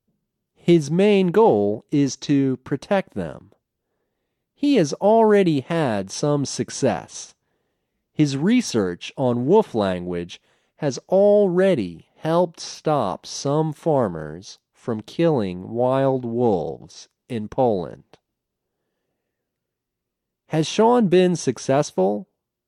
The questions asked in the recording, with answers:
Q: Has Sean been successful?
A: Yes, his research on wolf language has stopped some farmers from killing wild wolves in Poland.